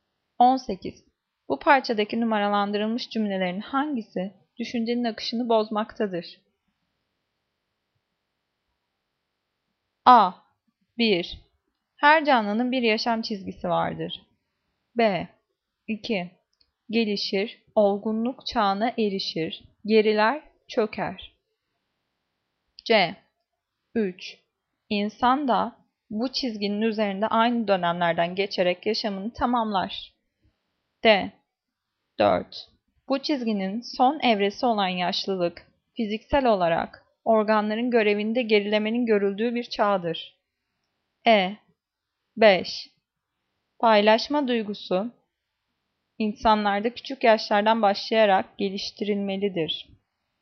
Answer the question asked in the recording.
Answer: Cevap E. 5. Paylaşma duygusu insanlarda küçük yaşlardan başlayarak geliştirilmelidir.